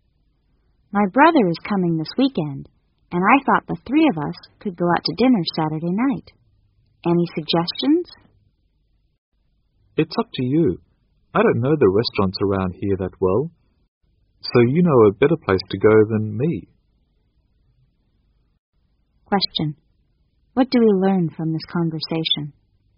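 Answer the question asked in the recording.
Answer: The woman wants the man to choose the restaurant.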